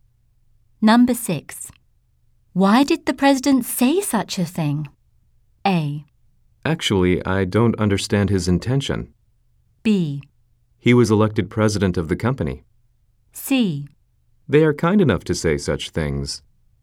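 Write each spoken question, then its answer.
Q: Why did the president say such a thing?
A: A: Actually, I don't understand his intention.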